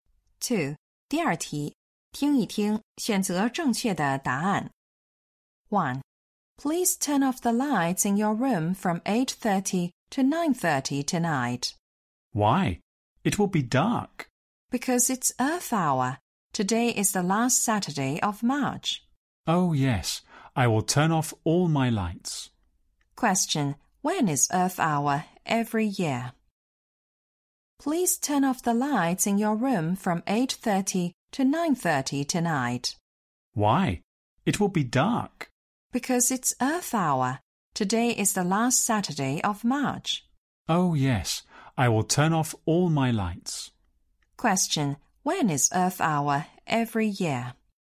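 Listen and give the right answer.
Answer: The last Saturday of March, from 8:30 to 9:30 p.m.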